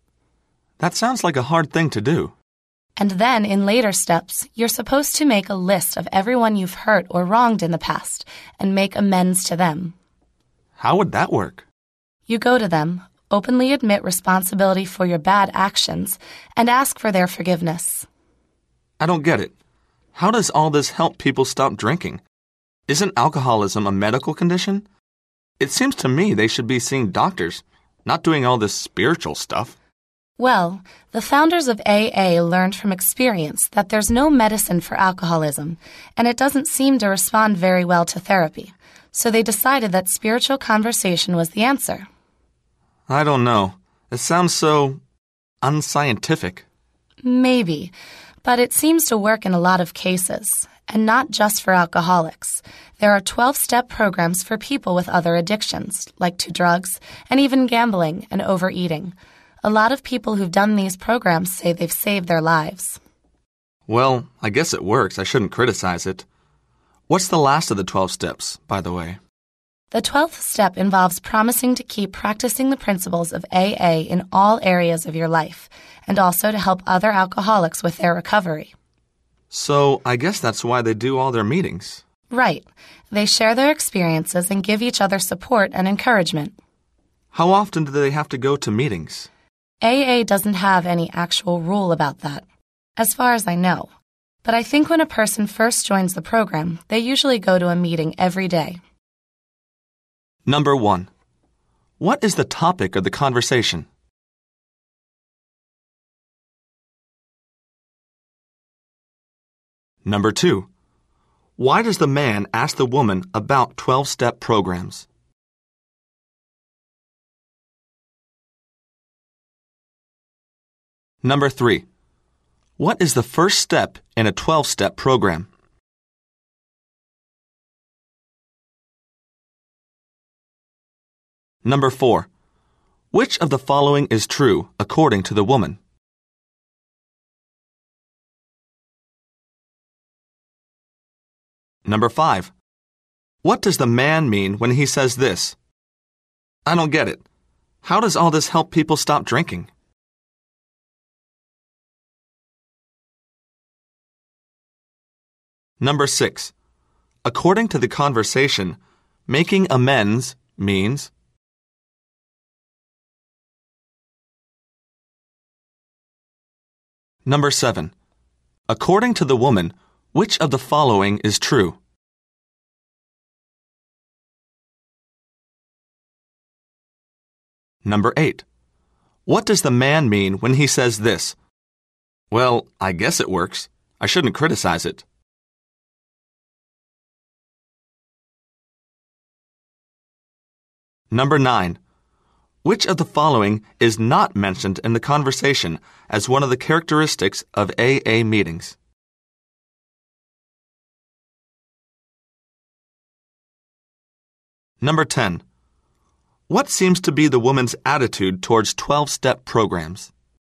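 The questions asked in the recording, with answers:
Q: What is the topic of the conversation?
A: Alcoholics Anonymous (AA) and its 12-step program

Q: According to the conversation, making amends means?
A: Going to people you have hurt, openly admitting responsibility and asking for their forgiveness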